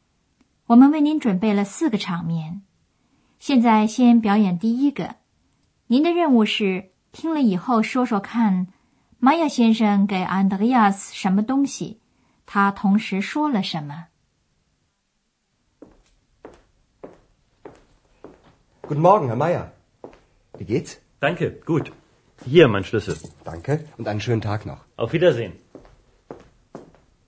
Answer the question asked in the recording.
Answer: 玛雅先生把他的钥匙放在桌子上说,这是我的钥匙。